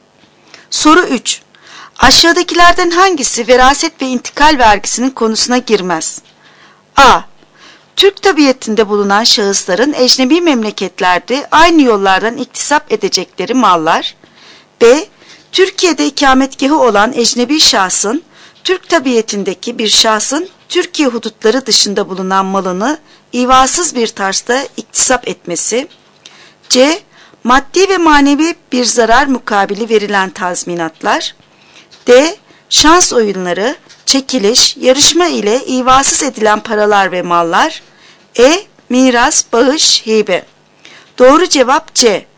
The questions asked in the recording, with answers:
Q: Aşağıdakilerden hangisi veraset ve intikal vergisinin konusuna girmez?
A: Doğru cevap C. Maddi ve manevi bir zarar mukabili verilen tazminatlar.